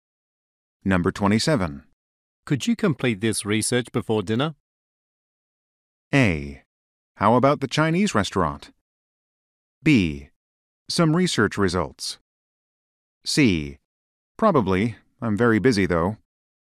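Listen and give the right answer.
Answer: C: Probably. I'm very busy, though.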